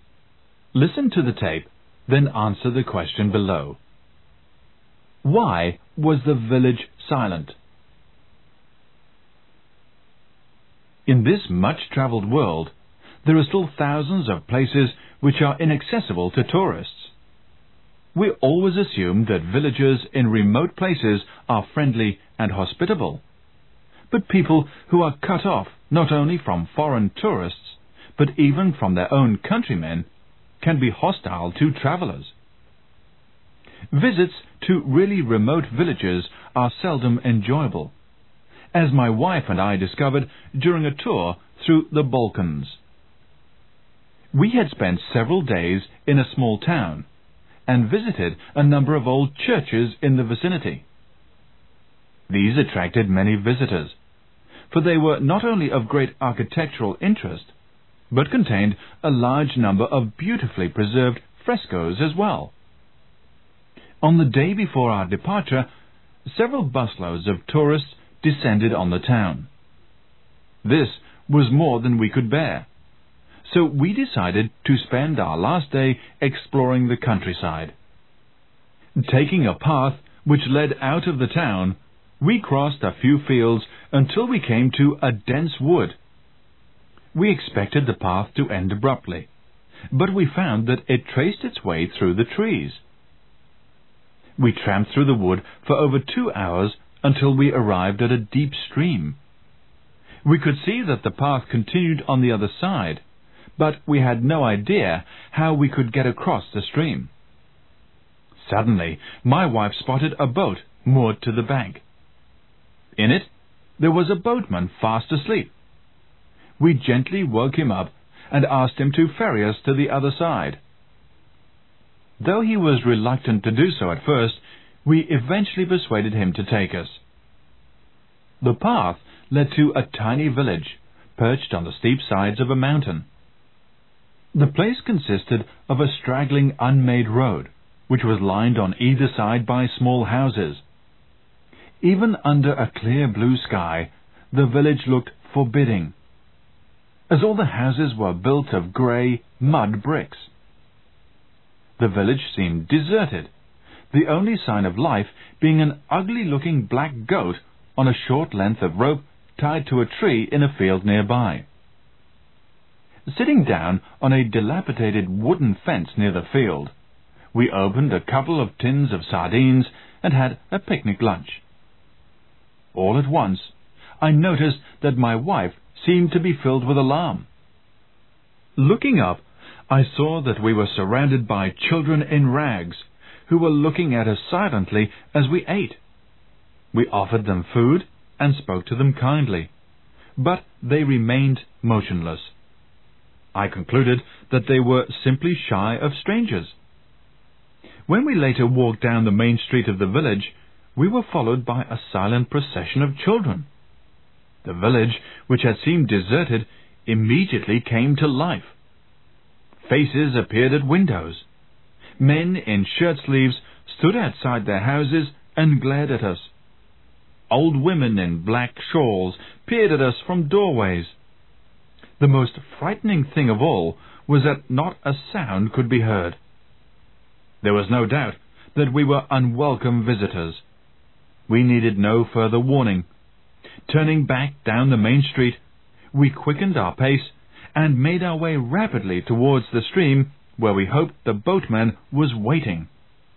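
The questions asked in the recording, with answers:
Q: Why was the village silent?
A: The villagers were cut off from outsiders and hostile to strangers; they silently showed the visitors they were unwelcome.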